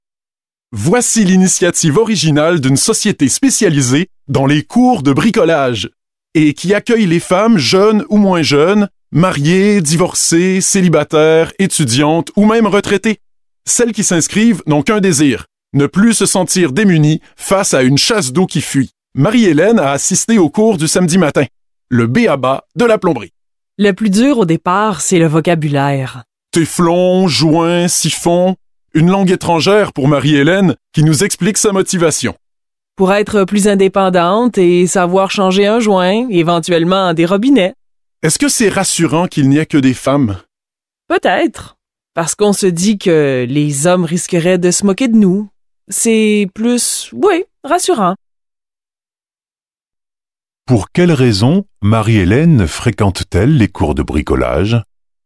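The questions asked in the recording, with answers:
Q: Pour quelle raison Marie-Hélène fréquente-t-elle les cours de bricolage?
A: Pour être plus indépendante et savoir changer un joint ou des robinets.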